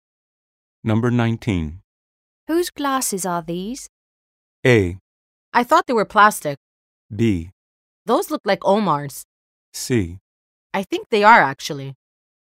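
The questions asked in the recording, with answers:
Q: Whose glasses are these?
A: B: Those look like Omar's.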